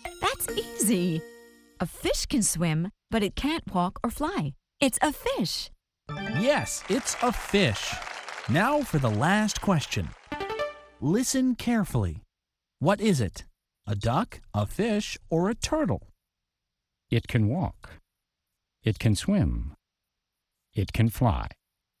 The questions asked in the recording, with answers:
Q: What is it?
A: It's a duck. A duck can swim, and a duck can walk, and a duck can fly.